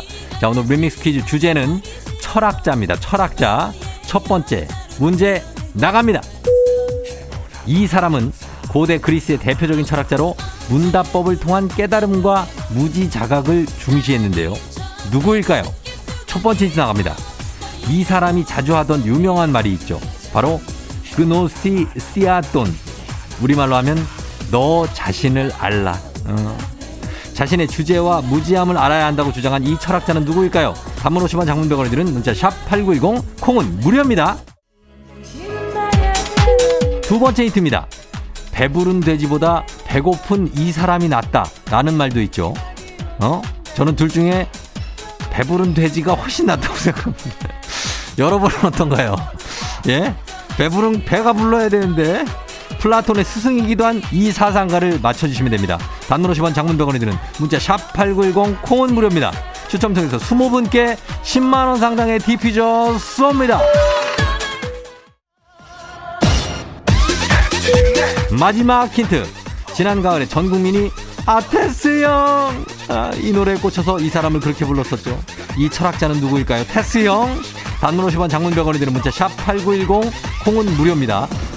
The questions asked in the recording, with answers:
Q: 이 철학자는 누구일까요?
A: 바로 소크라테스죠. 소크라테스입니다.